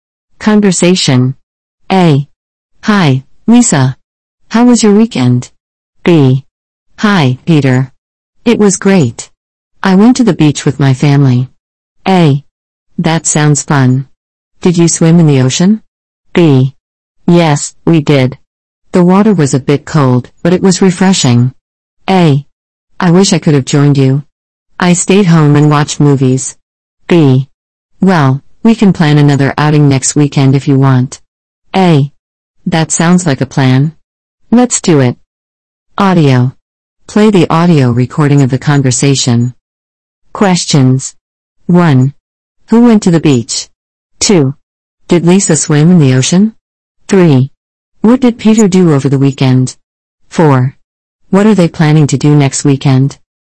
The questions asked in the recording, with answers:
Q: Who went to the beach?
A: Lisa went to the beach.

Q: Did Lisa swim in the ocean?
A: Yes, Lisa swam in the ocean.

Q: What did Peter do over the weekend?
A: Peter stayed home and watched movies.

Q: What are they planning to do next weekend?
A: They are planning to have another outing next weekend.